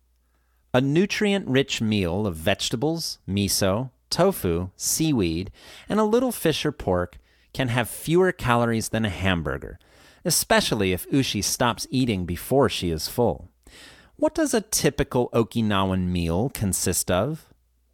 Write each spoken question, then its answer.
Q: What does a typical Okinawan meal consist of?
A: It consists of vegetables, miso, tofu, seaweed, and a little fish or pork.